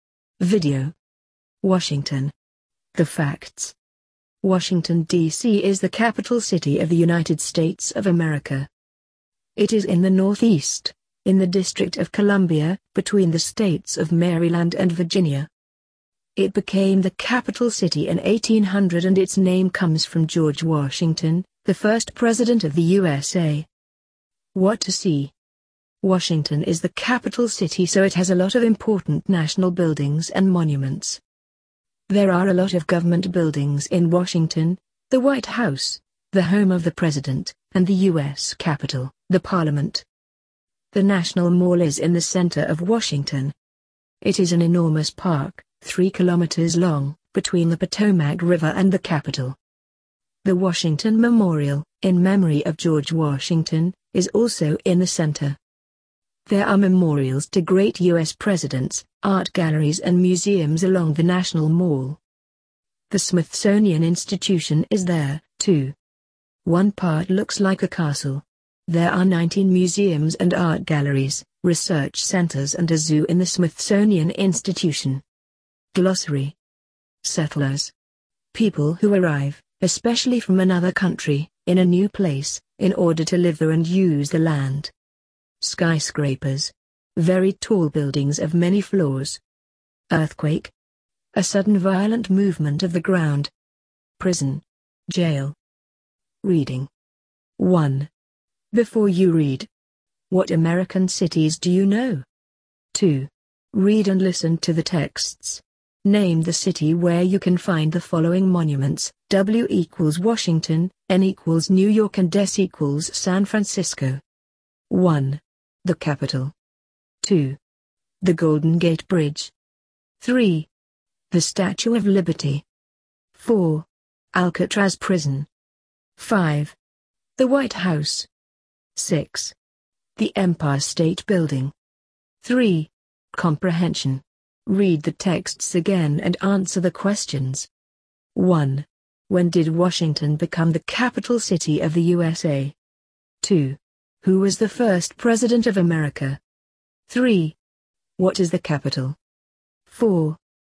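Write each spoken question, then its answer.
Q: When did Washington become the capital city of the USA?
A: In 1800

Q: Who was the first president of America?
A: George Washington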